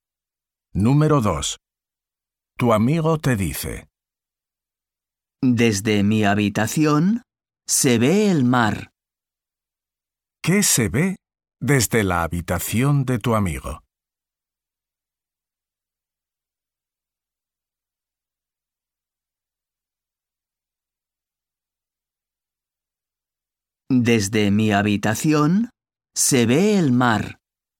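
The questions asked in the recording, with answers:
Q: ¿Qué se ve desde la habitación de tu amigo?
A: El mar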